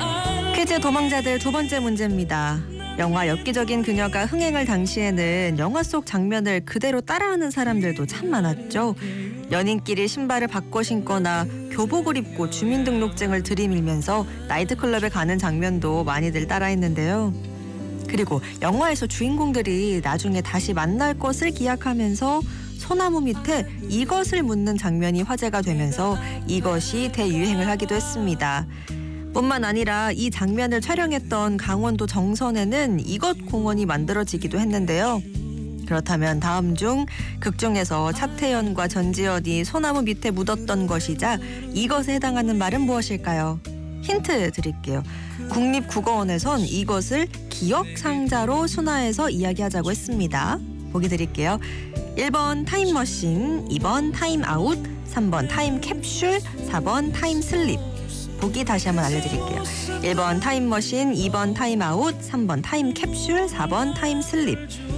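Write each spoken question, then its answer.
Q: 그렇다면 다음 중 극중에서 차태현과 전지현이 소나무 밑에 묻었던 것이자 이것에 해당하는 말은 무엇일까요?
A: 3번: 타임캡슐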